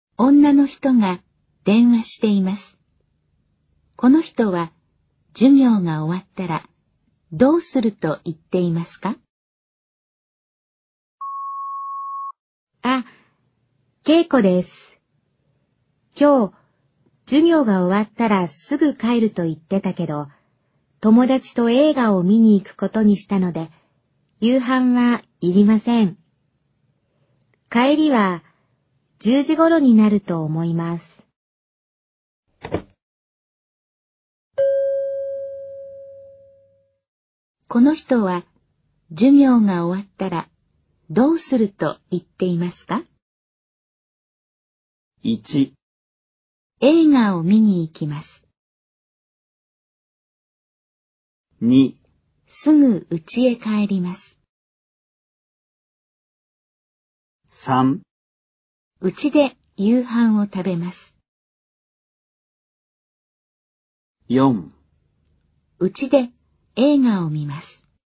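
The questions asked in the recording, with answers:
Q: この人は授業が終わったらどうすると言っていますか?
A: 1: 映画を見に行きます。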